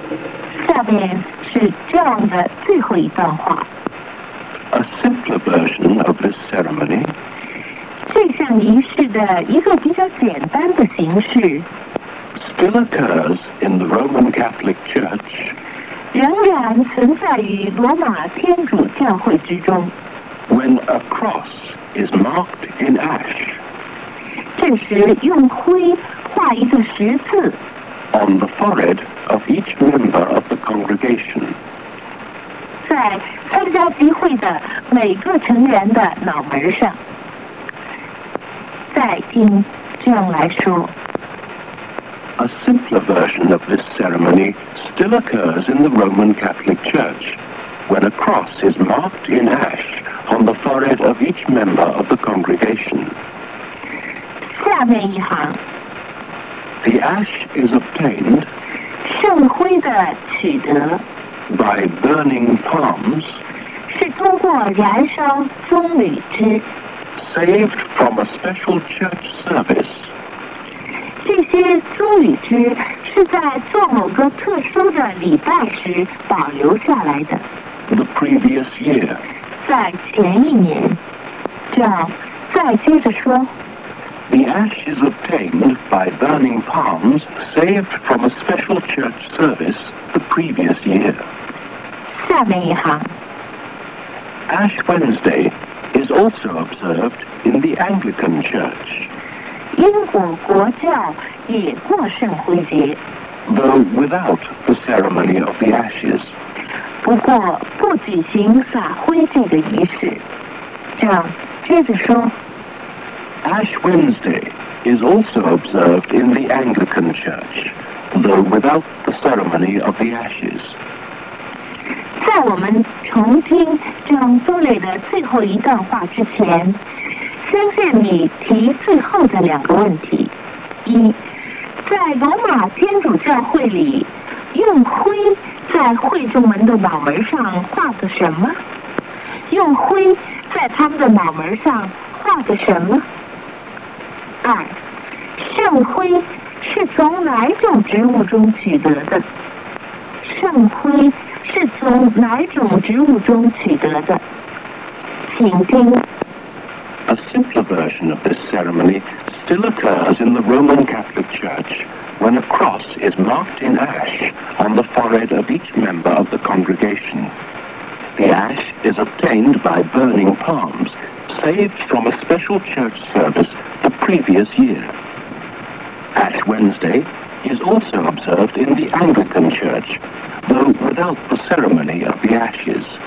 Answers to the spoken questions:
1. A cross.
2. The palm,